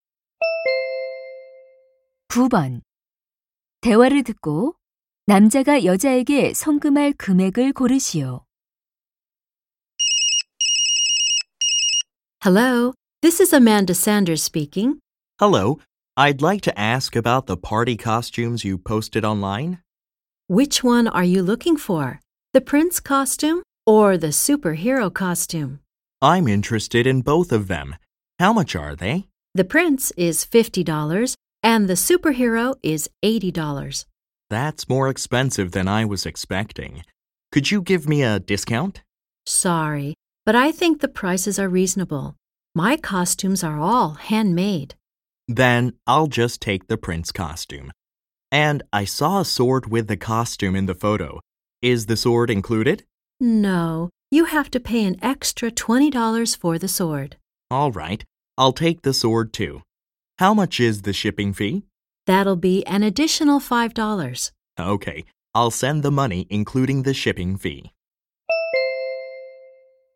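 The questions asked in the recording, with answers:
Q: 대화를 듣고 남자가 여자에게 송금할 금액을 고르시오.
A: $75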